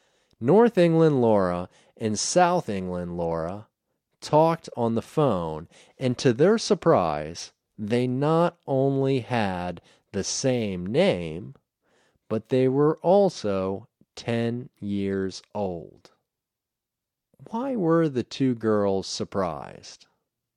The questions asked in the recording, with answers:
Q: Why were the two girls surprised?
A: The two girls were surprised because they had the same name and they were the same age.